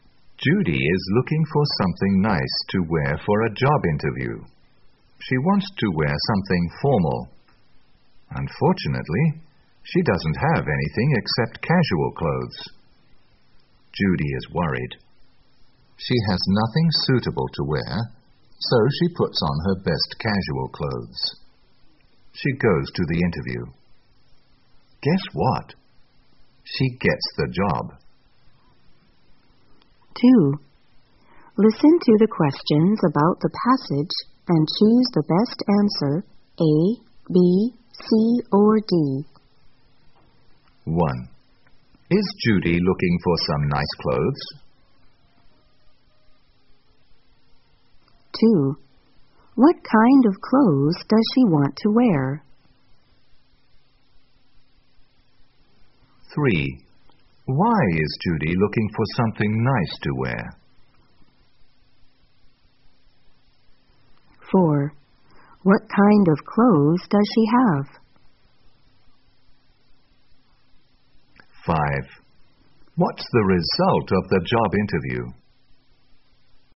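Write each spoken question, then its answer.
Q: Is Judy looking for some nice clothes?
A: Yes, she is.

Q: What kind of clothes does she want to wear?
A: Something formal

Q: Why is Judy looking for something nice to wear?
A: For a job interview

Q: What kind of clothes does she have?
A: Only casual clothes

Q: What's the result of the job interview?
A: She gets the job.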